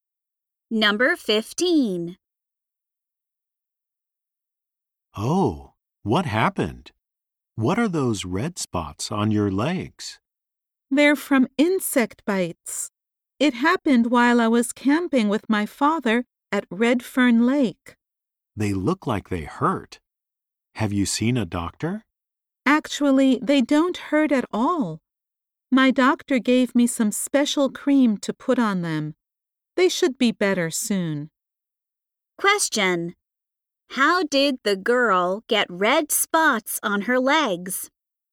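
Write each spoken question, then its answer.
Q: How did the girl get red spots on her legs?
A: From insect bites while camping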